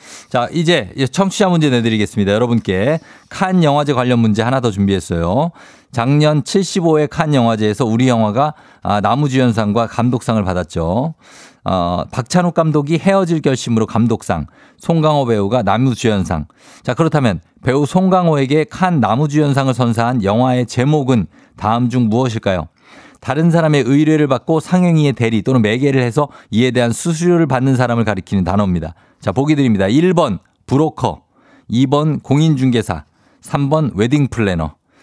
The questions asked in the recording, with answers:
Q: 자, 그렇다면 배우 송강호에게 칸 남우주연상을 선사한 영화의 제목은 다음 중 무엇일까요?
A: 정답 바로 브로커죠.